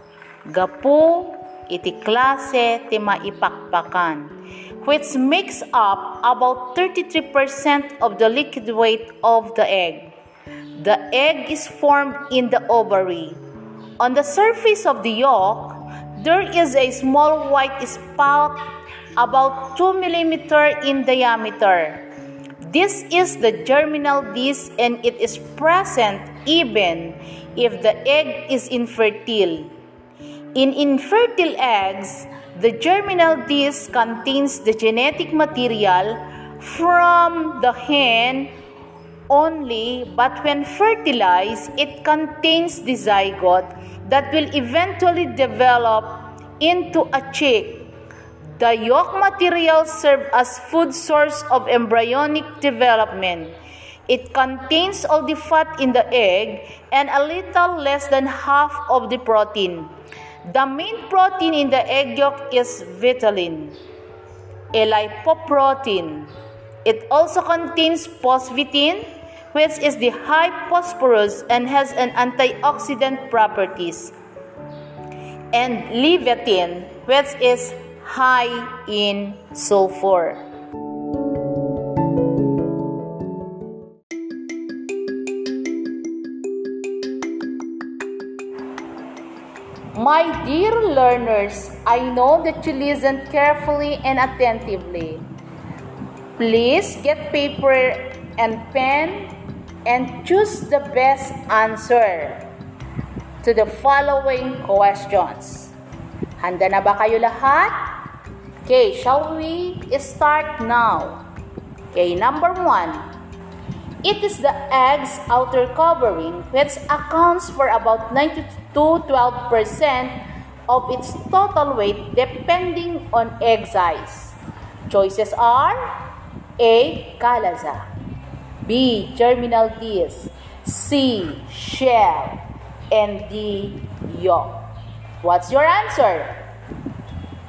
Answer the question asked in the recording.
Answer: C. Shell.